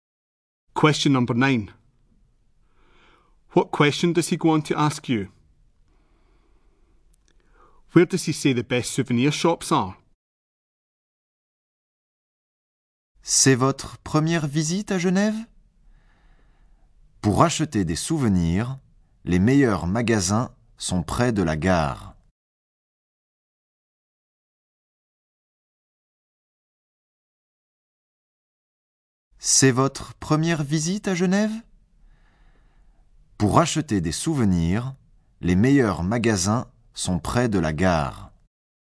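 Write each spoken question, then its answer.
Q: What question does he go on to ask you?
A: Is this your first visit to Geneva?

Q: Where does he say the best souvenir shops are?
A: Near the station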